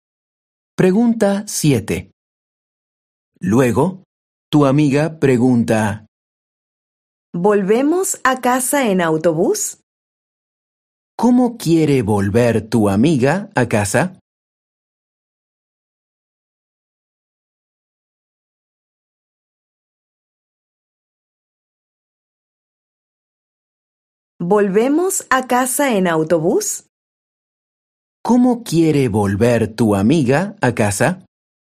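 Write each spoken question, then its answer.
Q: ¿Cómo quiere volver tu amiga a casa?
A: en autobús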